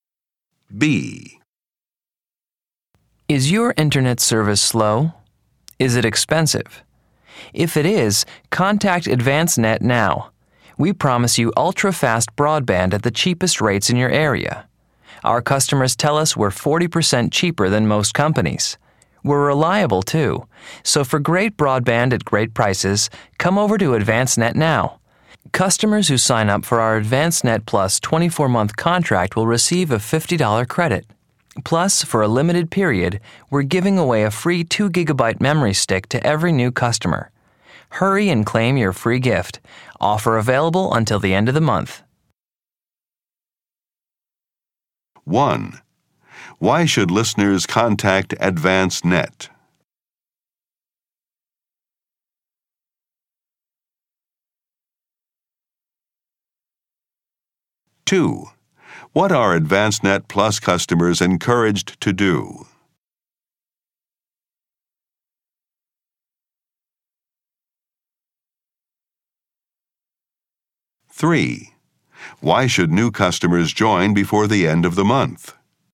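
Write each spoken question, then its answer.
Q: Why should listeners contact AdvanceNet?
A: For ultra-fast, cheap, reliable broadband

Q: Why should new customers join before the end of the month?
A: To get a free 2GB memory stick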